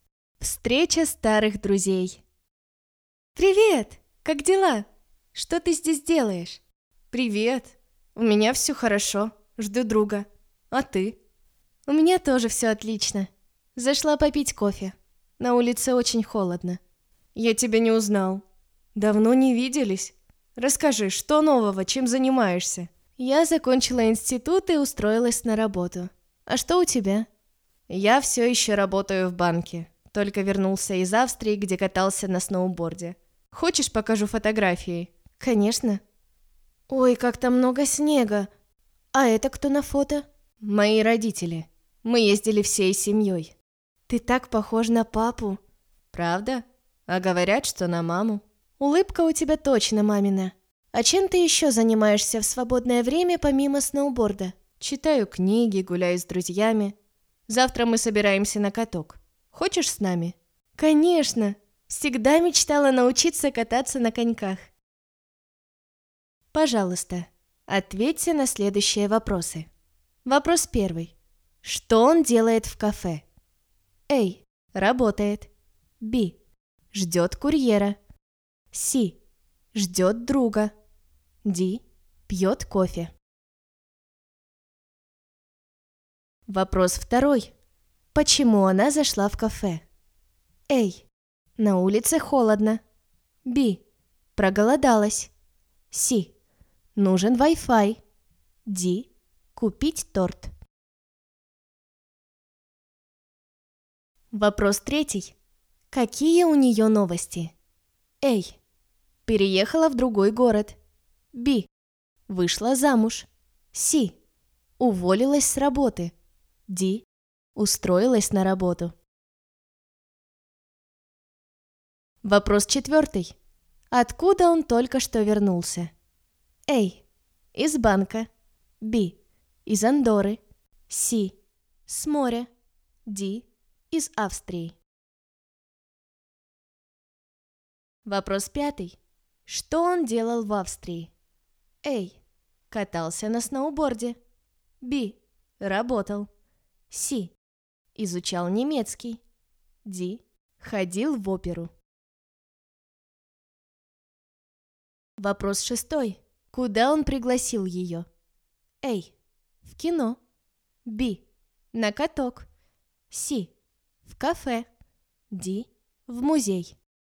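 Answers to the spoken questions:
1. C: Ждет друга.
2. А: На улице холодно.
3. Д: Устроилась на работу.
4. Д: Из Австрии.
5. А: Катался на сноуборде.
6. Б: На каток.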